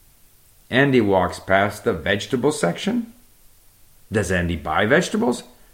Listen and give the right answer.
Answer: No, Andy does not buy vegetables.